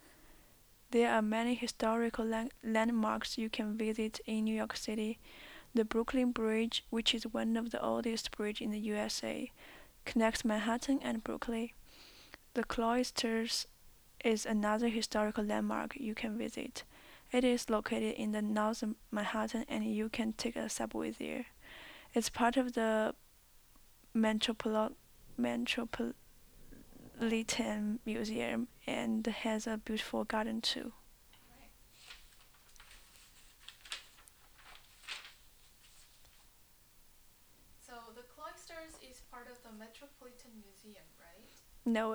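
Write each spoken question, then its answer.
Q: So the Cloisters is part of the Metropolitan Museum, right?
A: Yes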